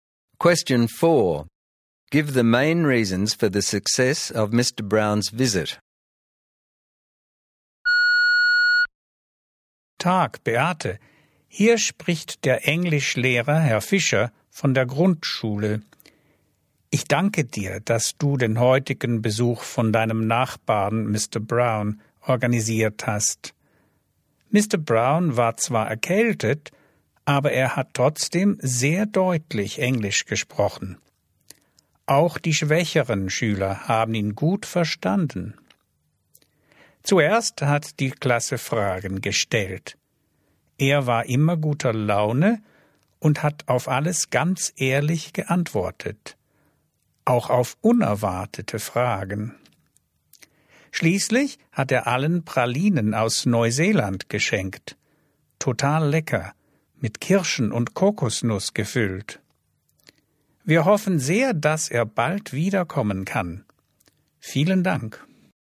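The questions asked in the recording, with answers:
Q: Give the main reasons for the success of Mr.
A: He spoke English clearly despite a cold so even weaker students understood, was always in a good mood, answered all questions honestly, and gave everyone chocolates from New Zealand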